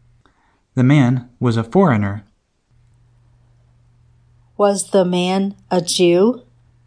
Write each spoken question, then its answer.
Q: Was the man a Jew?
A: No, the man was a foreigner.